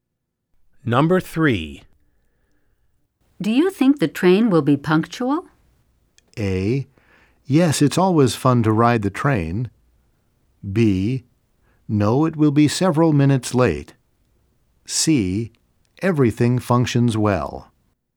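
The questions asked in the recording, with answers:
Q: Do you think the train will be punctual?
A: B: No, it will be several minutes late.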